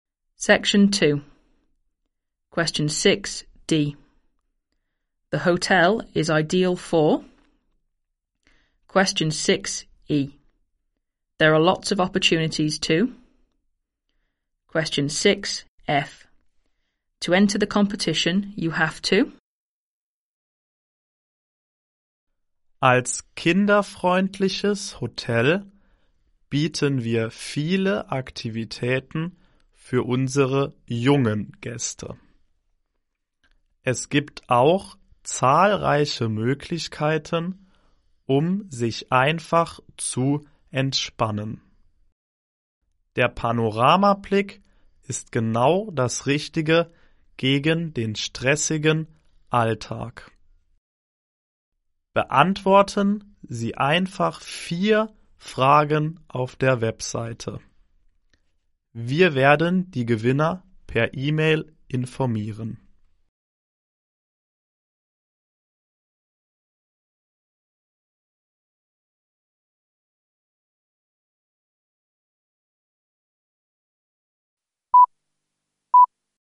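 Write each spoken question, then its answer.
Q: The hotel is ideal for...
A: Families with children

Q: There are lots of opportunities to...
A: Relax

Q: To enter the competition, you have to...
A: Answer 4 questions on the website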